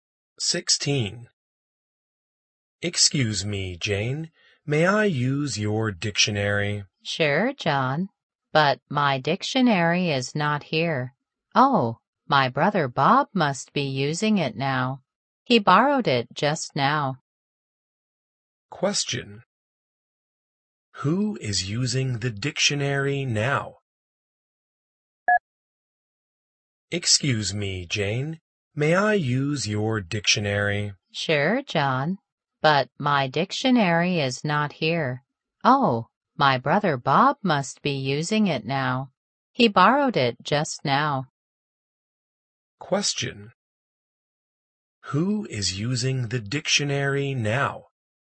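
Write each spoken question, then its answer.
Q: Who is using the dictionary now?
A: Bob, Jane's brother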